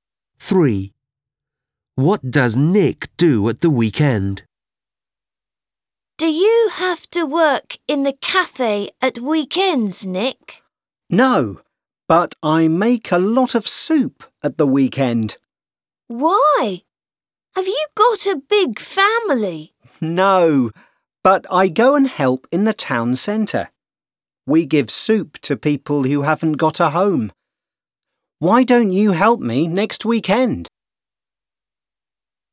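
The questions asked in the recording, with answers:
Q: What does Nick do at the weekend?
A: He makes soup and gives it to homeless people in the town centre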